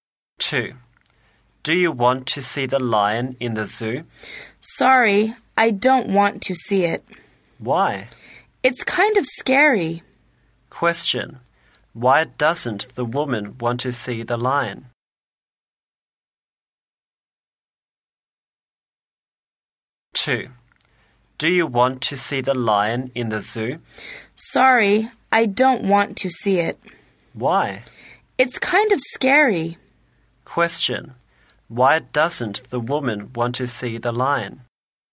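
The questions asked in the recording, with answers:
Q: Why doesn't the woman want to see the lion?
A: It's kind of scary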